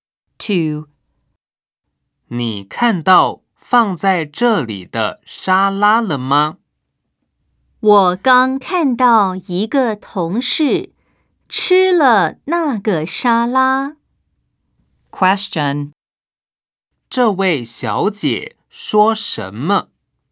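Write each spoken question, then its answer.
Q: 这位小姐说什么?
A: 她看到一个同事吃了那个沙拉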